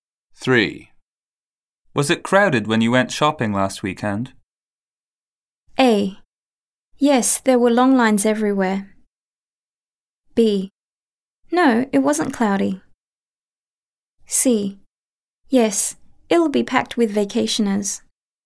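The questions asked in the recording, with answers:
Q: Was it crowded when you went shopping last weekend?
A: A: Yes, there were long lines everywhere.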